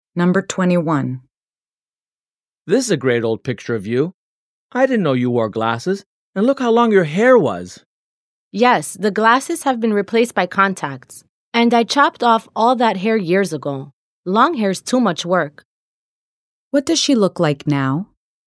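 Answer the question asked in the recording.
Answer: She has short hair and no glasses (she wears contacts).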